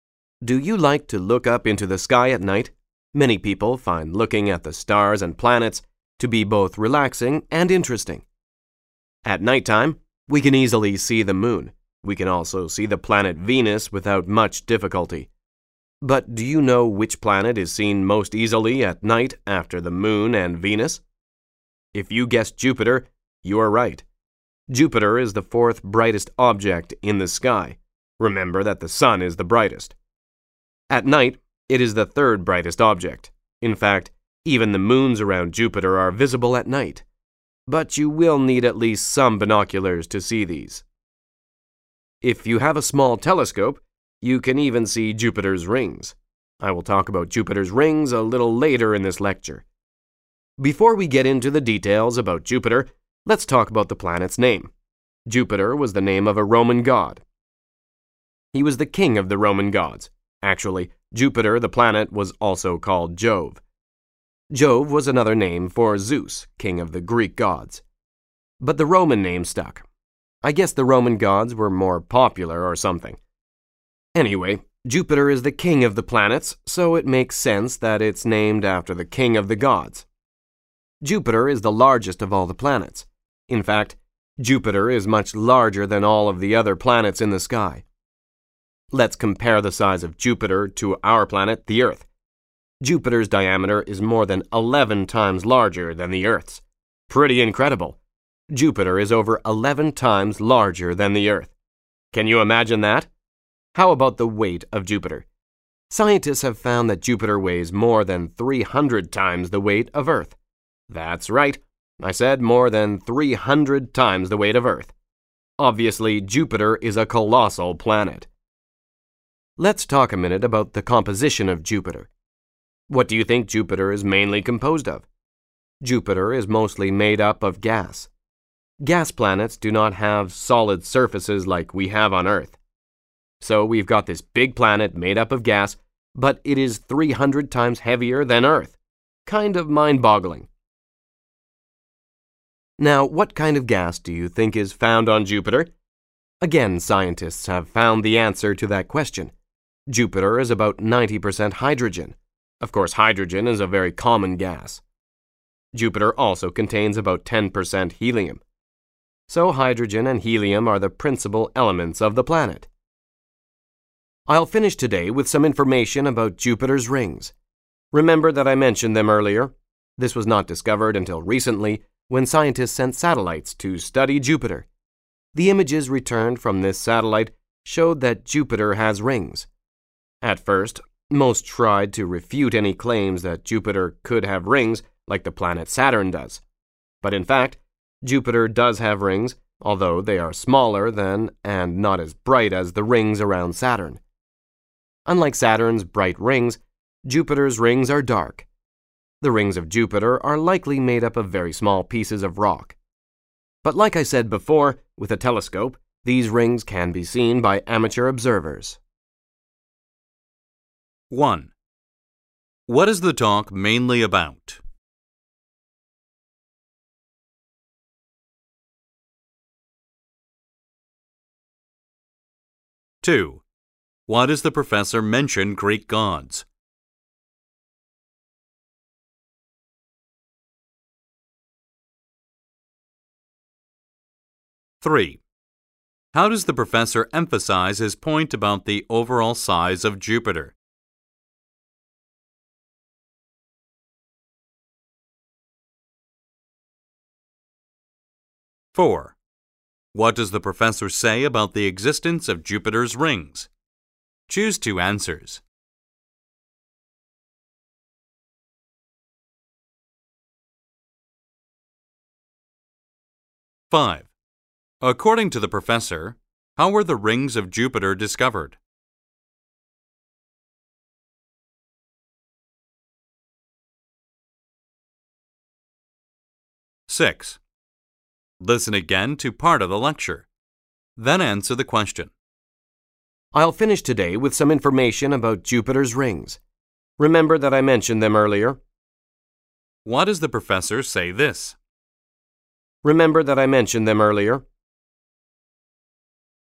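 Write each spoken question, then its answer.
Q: What is the talk mainly about?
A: The planet Jupiter

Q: Why does the professor mention Greek gods?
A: To explain where Jupiter's name came from (Jove, another name for Zeus)

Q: How does the professor emphasize his point about the overall size of Jupiter?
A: By comparing it with Earth (over 11 times the diameter, over 300 times the weight)

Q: According to the professor, how were the rings of Jupiter discovered?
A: From images sent back by satellites sent to study Jupiter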